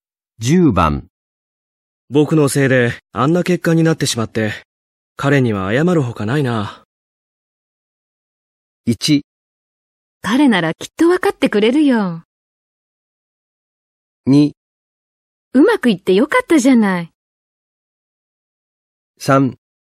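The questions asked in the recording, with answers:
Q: 僕のせいであんな結果になってしまって、彼には謝るほかないな。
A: 1: 彼ならきっと分かってくれるよ。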